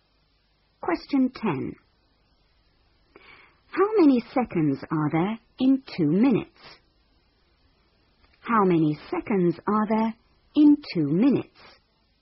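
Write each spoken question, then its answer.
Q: How many seconds are there in 2 minutes?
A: 120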